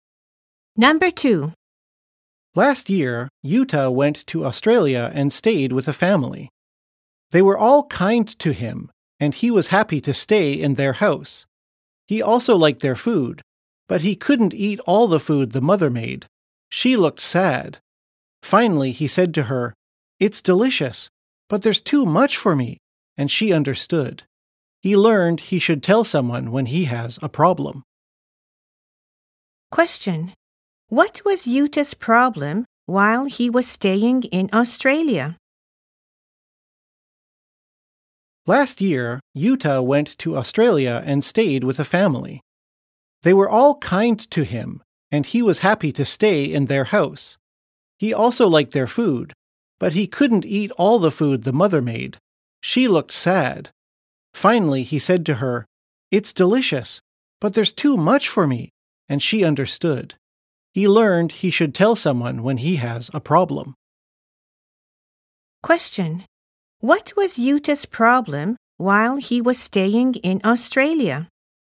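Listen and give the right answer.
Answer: He couldn't eat all the food the mother made because there was too much.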